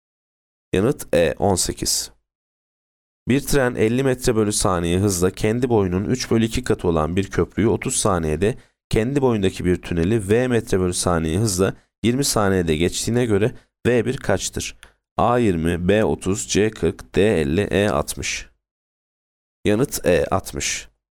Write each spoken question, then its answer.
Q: Bir tren 50 metre bölü saniye hızla kendi boyunun 3 bölü 2 katı olan bir köprüyü 30 saniyede, kendi boyundaki bir tüneli V metre bölü saniye hızla 20 saniyede geçtiğine göre V1 kaçtır?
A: Yanıt E 60.